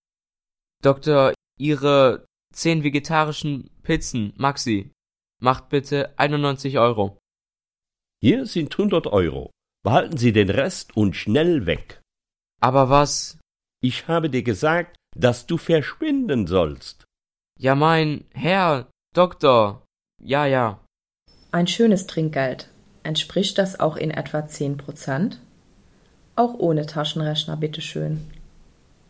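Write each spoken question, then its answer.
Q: Ein schönes Trinkgeld. Entspricht das auch in etwa 10%?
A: Ja, 9 Euro sind etwa 10% von 91 Euro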